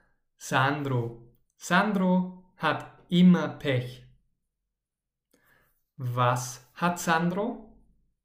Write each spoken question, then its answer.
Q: Was hat Sandro?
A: Pech. Er hat immer Pech.